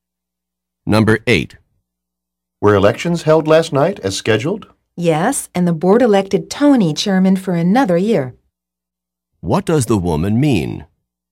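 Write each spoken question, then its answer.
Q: What does the woman mean?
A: The board re-elected Tony as chairman for another year.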